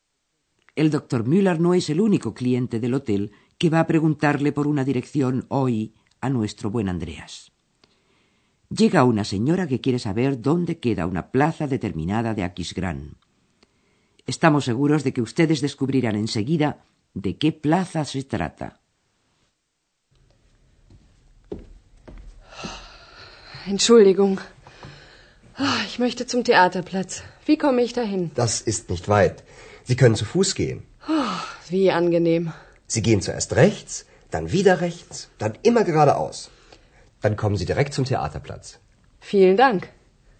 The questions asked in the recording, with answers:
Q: Estamos seguros de que ustedes descubrirán enseguida de qué plaza se trata.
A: plaza que busca la señora es la plaza del teatro.